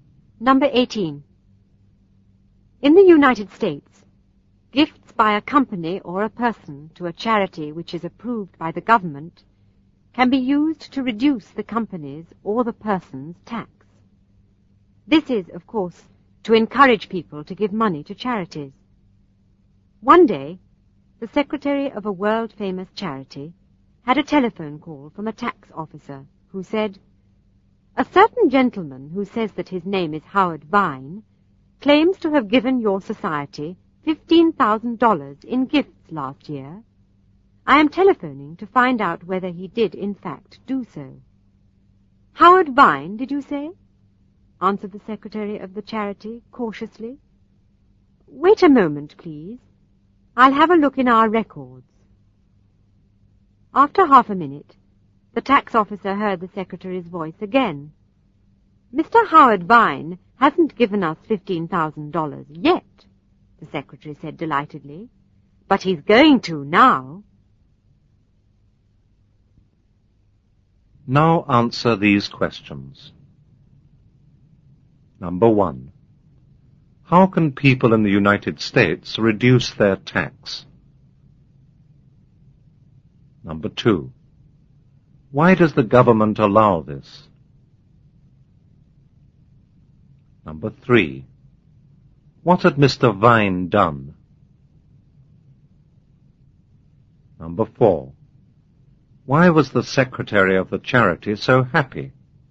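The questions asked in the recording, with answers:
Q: How can people in the United States reduce their tax?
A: By giving gifts to a charity approved by the government

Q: Why does the government allow this?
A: To encourage people to give money to charities

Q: What had Mr. Vine done?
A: He had claimed to have given the charity $15,000 last year, although he hadn't

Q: Why was the secretary of the charity so happy?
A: Because Mr. Vine would now have to really give the charity $15,000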